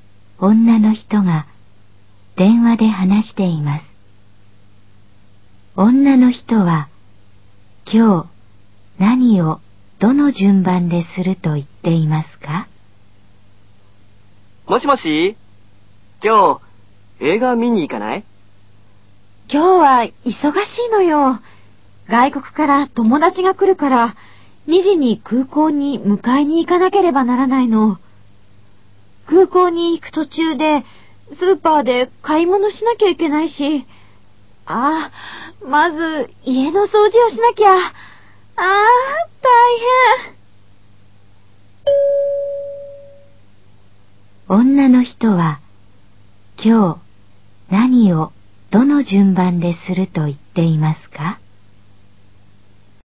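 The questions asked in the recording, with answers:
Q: 女の人は、今日何をどの順番ですると言っていますか?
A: 家の掃除、スーパーで買い物、空港に迎えに行く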